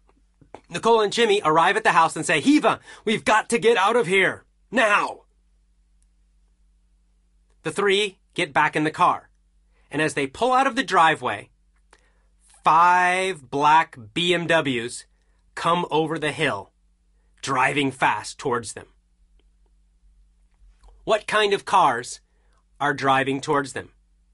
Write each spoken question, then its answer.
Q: What kind of cars are driving towards them?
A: Black BMWs are driving towards them.